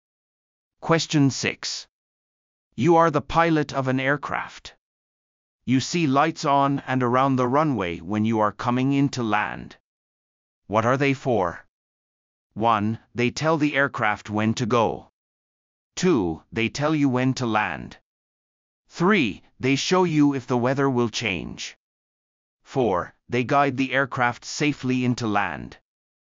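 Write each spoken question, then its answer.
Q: What are they for?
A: 4: They guide the aircraft safely into land.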